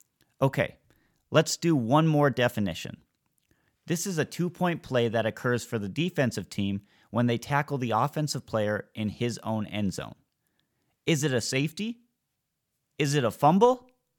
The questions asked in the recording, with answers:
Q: This is a 2-point play that occurs for the defensive team when they tackle the offensive player in his own end zone.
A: It is indeed a safety.